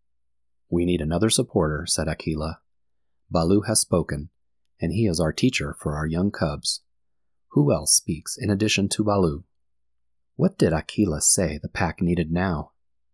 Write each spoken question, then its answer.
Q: What did Akela say the pack needed now?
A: Akela, the wolf pack leader, said that Mowgli needed another supporter in addition to Baloo.